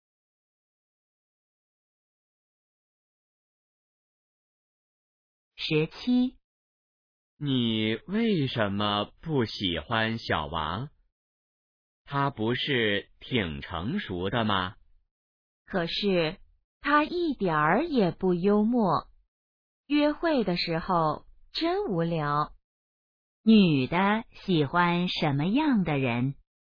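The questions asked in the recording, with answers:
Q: 女的喜欢什么样的人?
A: 幽默的人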